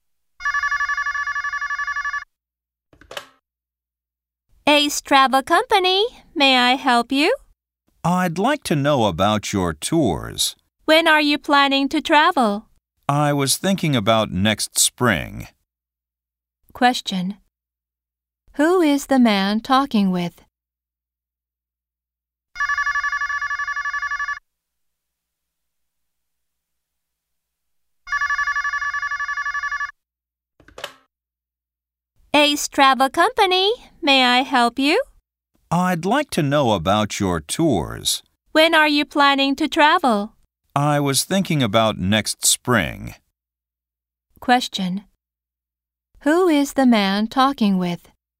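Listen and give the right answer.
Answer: A travel agent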